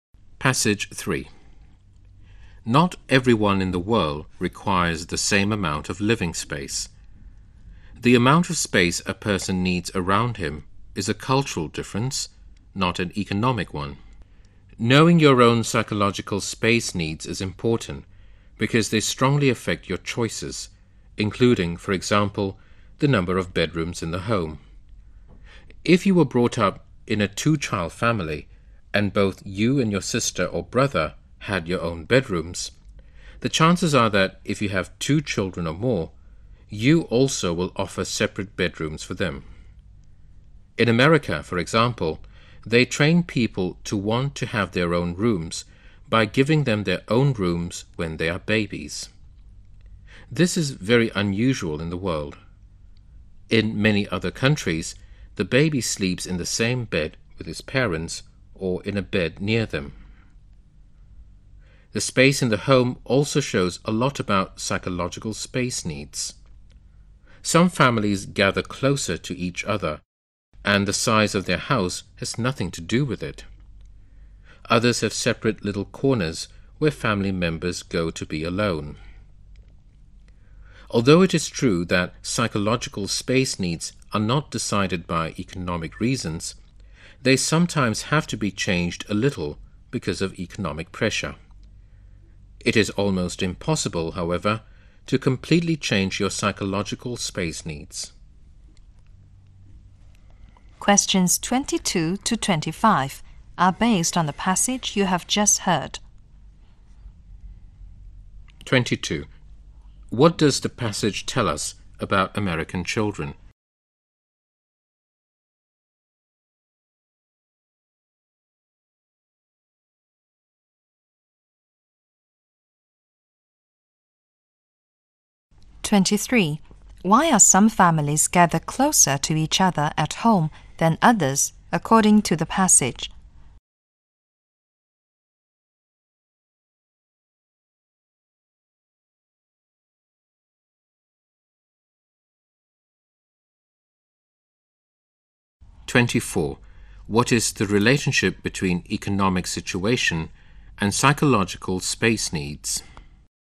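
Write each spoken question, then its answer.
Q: What does the passage tell us about American children?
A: They are given their own rooms as babies

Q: What is the relationship between economic situation and psychological space needs?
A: Economic pressure may change space needs a little, but does not decide them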